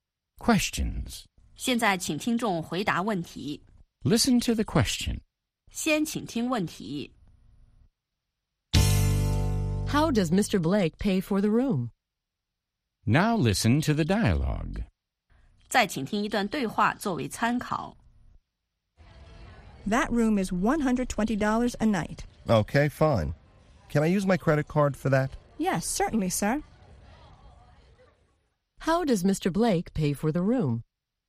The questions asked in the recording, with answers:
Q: How does Mr. Blake pay for the room?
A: He uses his credit card.